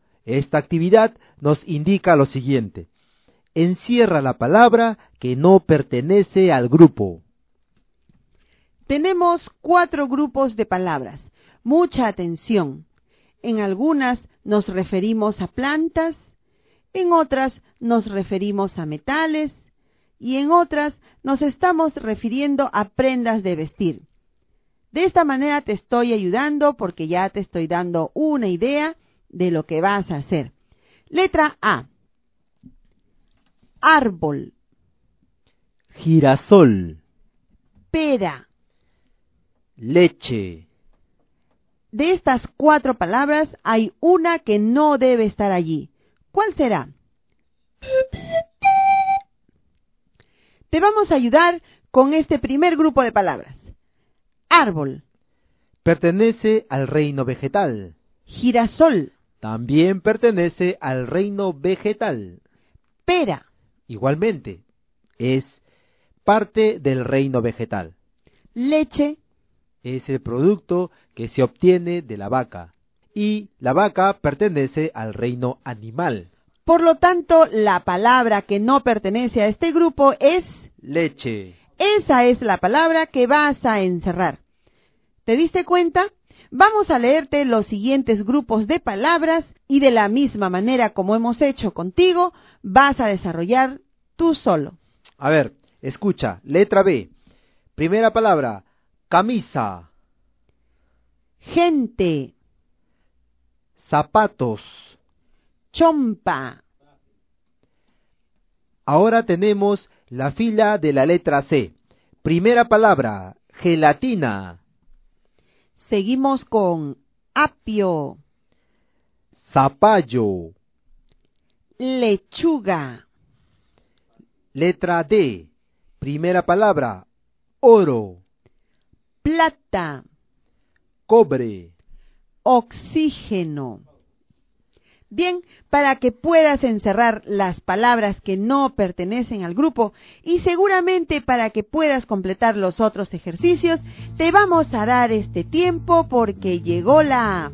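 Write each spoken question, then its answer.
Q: A ver, escucha, letra B. Primera palabra, camisa.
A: gente

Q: Ahora tenemos la fila de la letra C.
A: gelatina

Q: Letra D. Primera palabra, oro.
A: oxígeno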